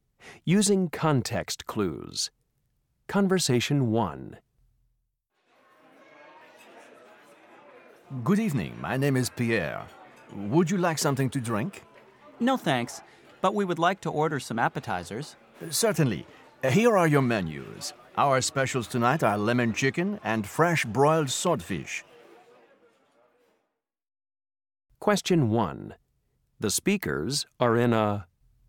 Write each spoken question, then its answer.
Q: The speakers are in a...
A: This is such a beautiful restaurant, Bob.